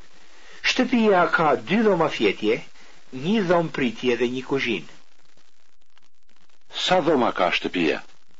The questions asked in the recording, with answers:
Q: Sa dhoma ka shtëpia?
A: Shtëpia ka 2 dhoma fjetje, 1 dhomë pritje dhe 1 kuzhinë.